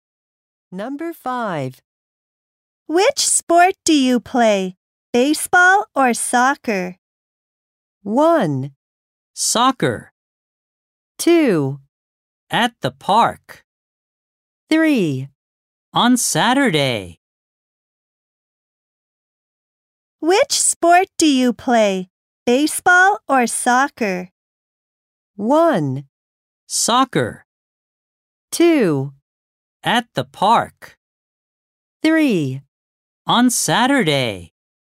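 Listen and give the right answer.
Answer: 1: Soccer.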